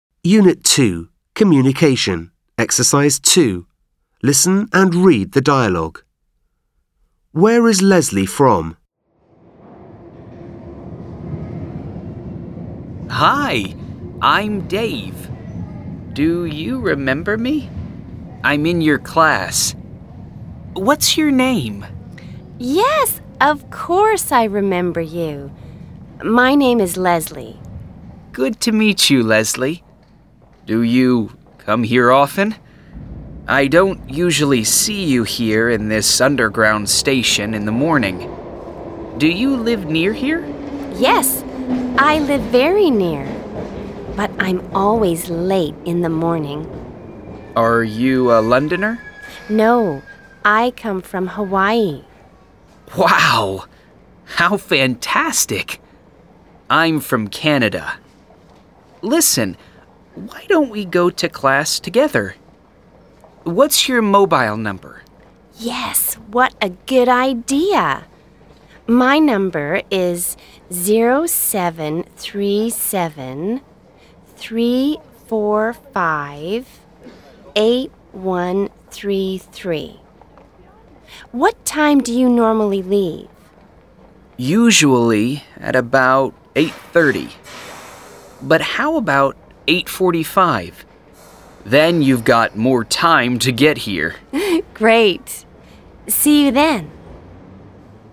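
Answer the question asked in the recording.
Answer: Hawaii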